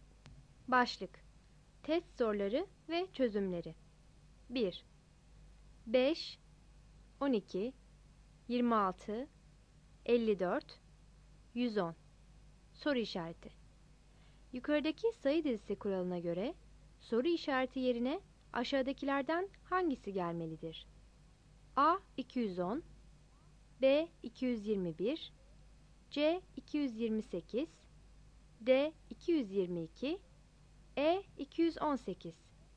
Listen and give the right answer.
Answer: Cevap D seçeneğidir.